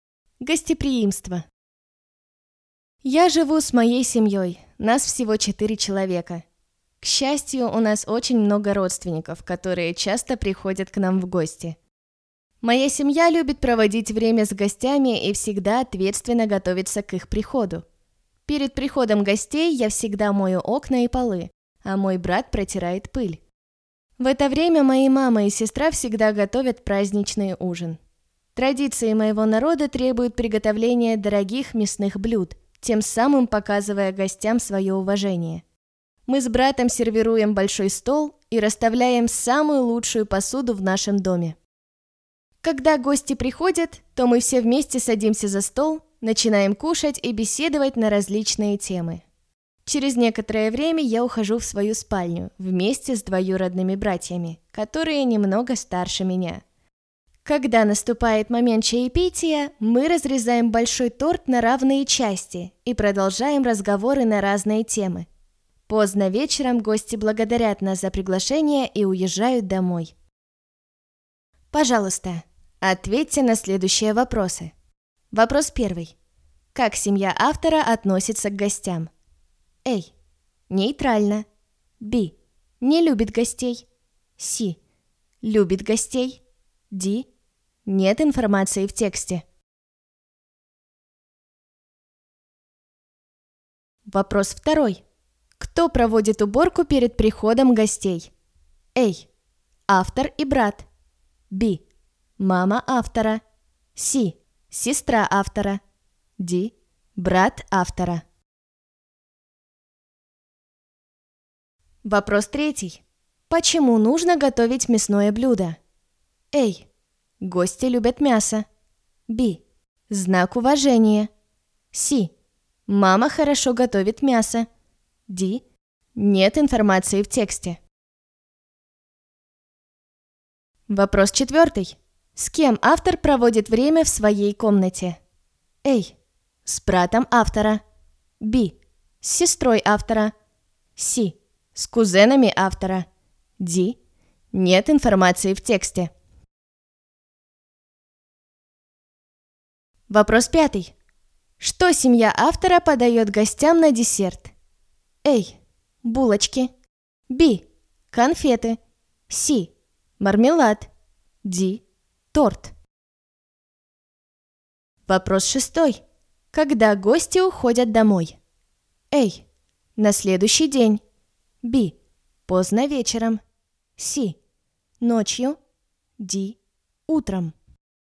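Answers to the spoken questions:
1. C: Любит гостей.
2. A: Автор и брат.
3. B: Знак уважения.
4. C: С кузенами автора.
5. D: Торт.
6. Б: Поздно вечером.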